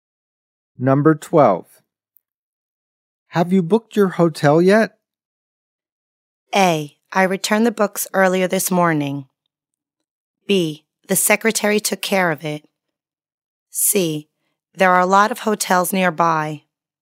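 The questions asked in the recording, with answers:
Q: Have you booked your hotel yet?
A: B: The secretary took care of it.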